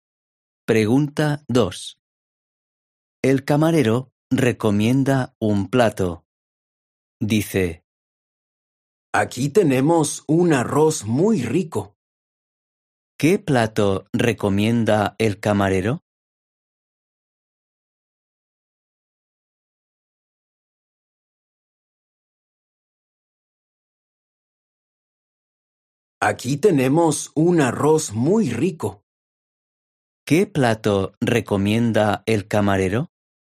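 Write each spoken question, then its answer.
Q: ¿Qué plato recomienda el camarero?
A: Arroz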